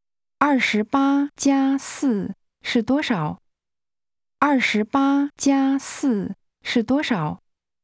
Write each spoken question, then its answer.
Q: 28+4是多少?28+4是多少?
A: 32。32。